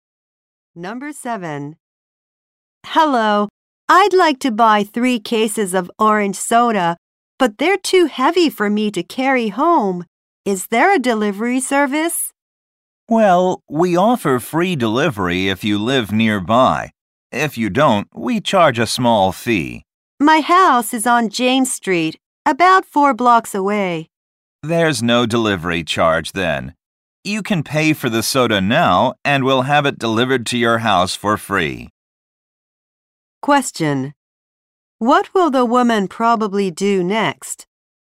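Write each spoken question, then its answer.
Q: What will the woman probably do next?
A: Pay for the soda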